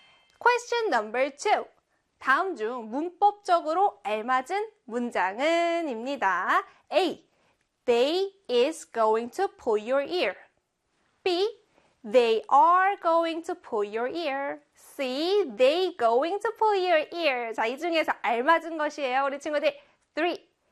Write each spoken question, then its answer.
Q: 다음 중 문법적으로 알맞은 문장은 입니다.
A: 정답은요? 그렇죠. B에 they are going to pull your ear.